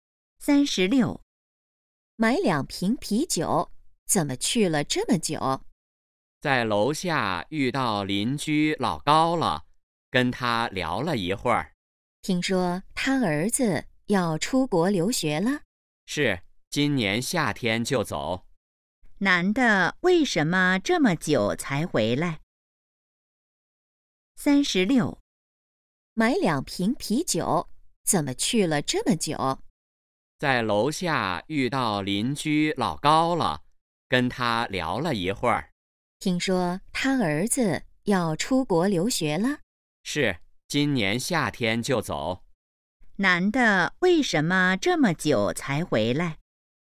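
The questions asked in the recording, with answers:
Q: 男的为什么这么久才回来?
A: 在楼下跟邻居老高聊了一会儿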